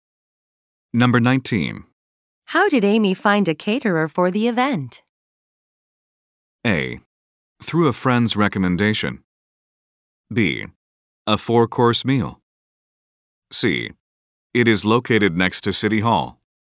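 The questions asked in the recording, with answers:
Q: How did Amy find a caterer for the event?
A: A: Through a friend's recommendation.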